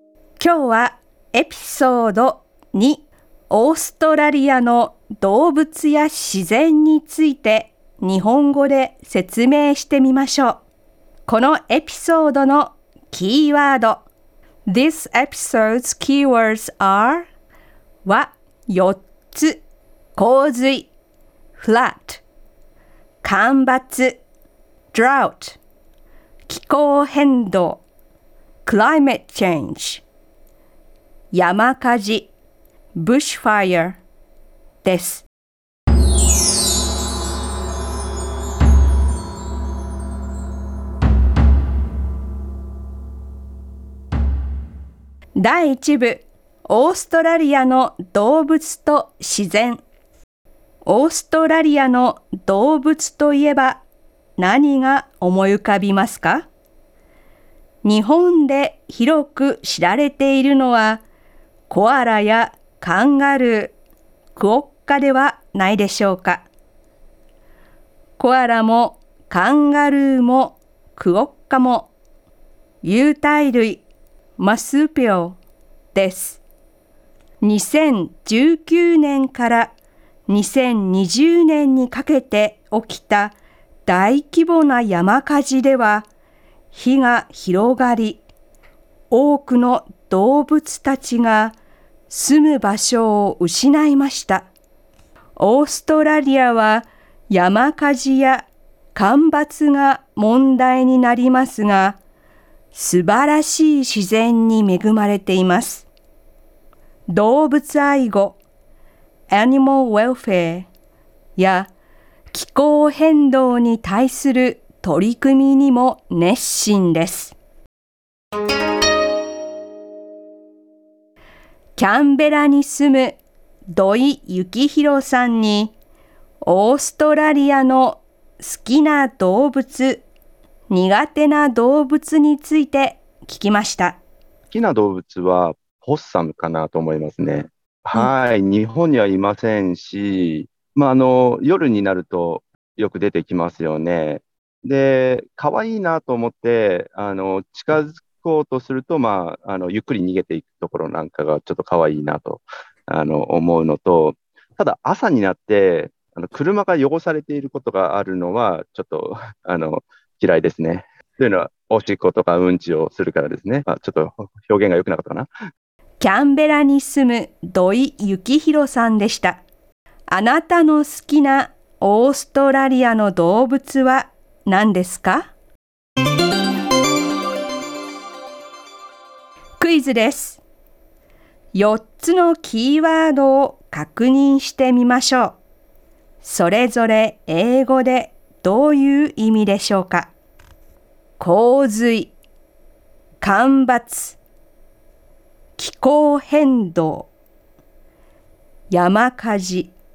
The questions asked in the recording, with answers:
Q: 気候変動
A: 気候変動は climate change